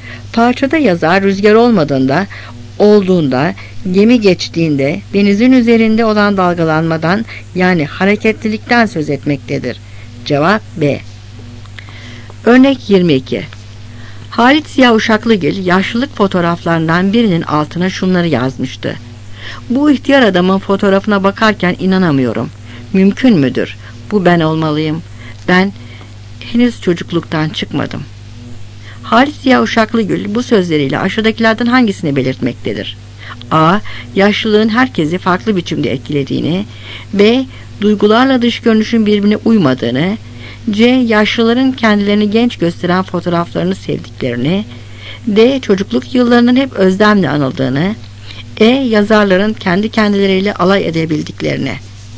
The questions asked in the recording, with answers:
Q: Halit Ziya Uşaklıgil bu sözleriyle aşağıdakilerden hangisini belirtmektedir?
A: Cevap B.